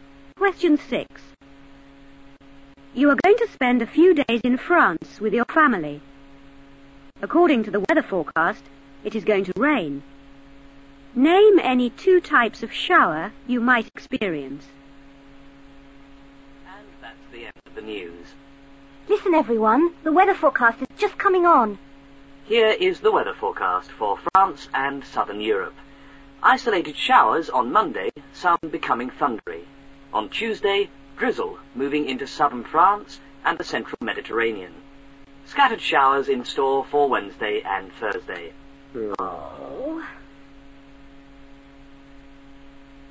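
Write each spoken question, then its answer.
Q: Name any 2 types of shower you might experience.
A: Any two of: isolated, thundery, scattered showers (or drizzle)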